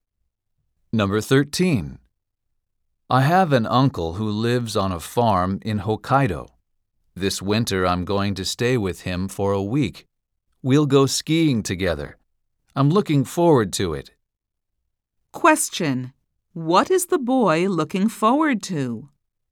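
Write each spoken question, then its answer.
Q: What is the boy looking forward to?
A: Going skiing with his uncle in Hokkaido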